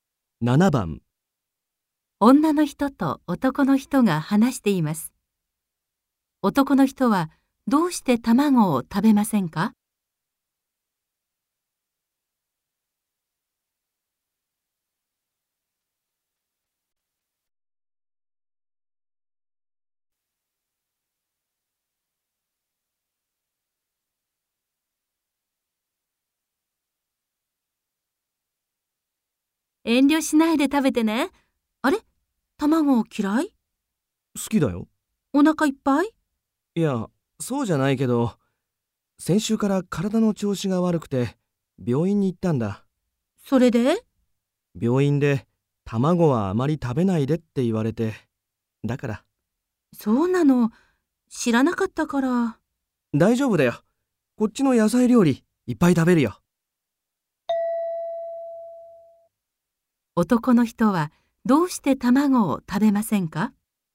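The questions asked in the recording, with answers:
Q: 男の人はどうして卵を食べませんか?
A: 病院で卵はあまり食べないでと言われたから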